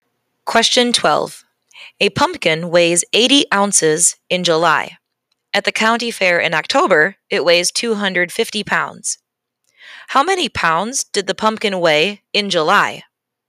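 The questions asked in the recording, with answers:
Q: How many pounds did the pumpkin weigh in July?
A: 5 pounds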